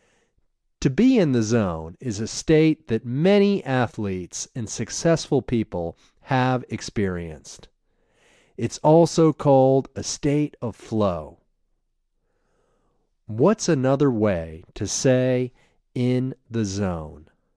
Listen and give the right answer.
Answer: A state of flow is another way to say in the zone.